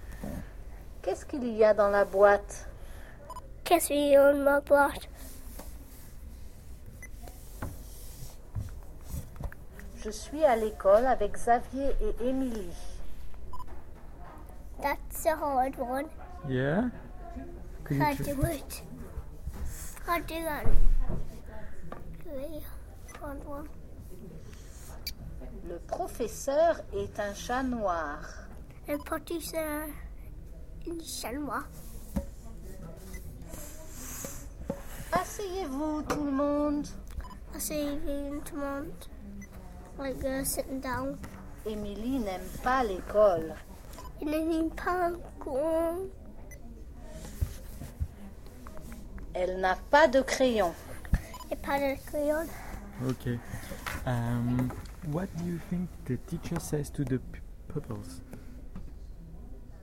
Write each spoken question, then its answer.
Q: What do you think the teacher says to the pupils?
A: Asseyez.